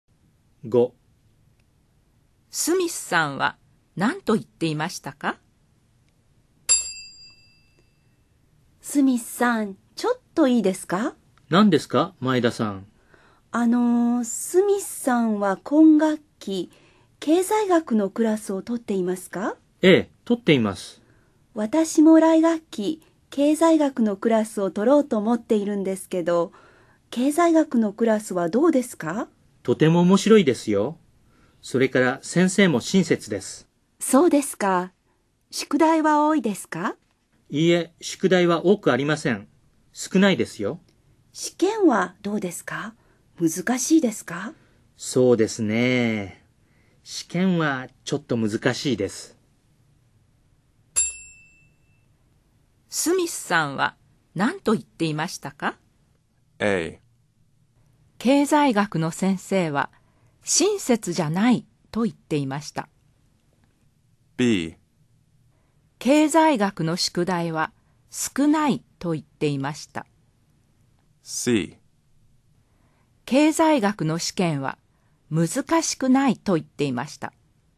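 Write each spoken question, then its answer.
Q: スミスさんは何と言っていましたか?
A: B: 経済学の宿題は少ないと言っていました。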